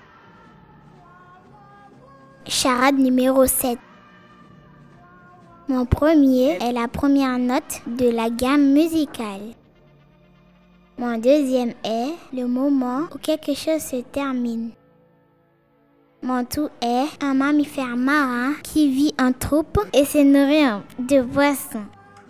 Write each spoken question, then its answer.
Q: Mon tout est un mammifère marin qui vit en troupe et se nourrit de poissons.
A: La bonne réponse est dauphin.